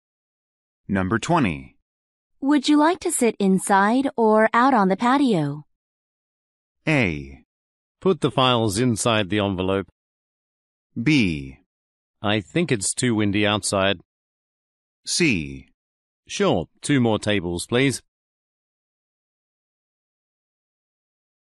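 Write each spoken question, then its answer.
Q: Would you like to sit inside or out on the patio?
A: B: I think it's too windy outside.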